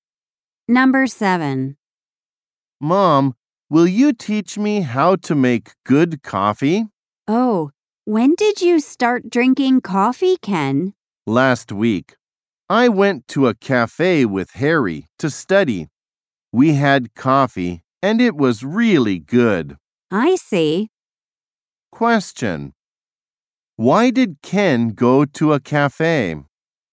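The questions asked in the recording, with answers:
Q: Why did Ken go to a cafe?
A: To study with Harry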